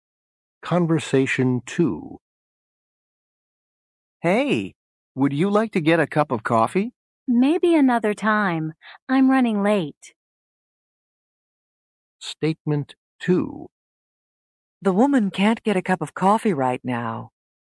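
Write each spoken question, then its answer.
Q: The woman can't get a cup of coffee right now.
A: True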